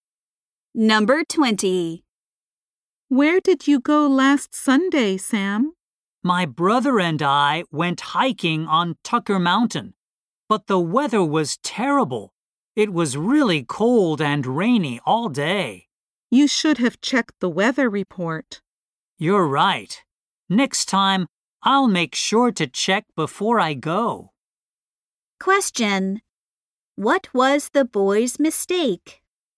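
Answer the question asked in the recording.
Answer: He didn't check the weather report before going hiking.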